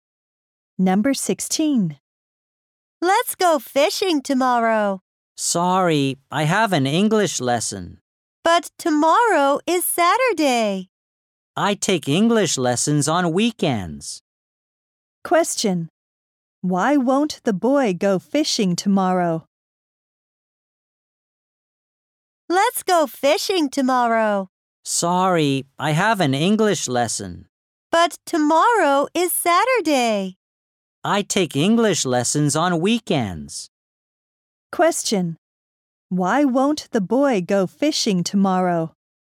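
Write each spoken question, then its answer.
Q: Why won't the boy go fishing tomorrow?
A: He has an English lesson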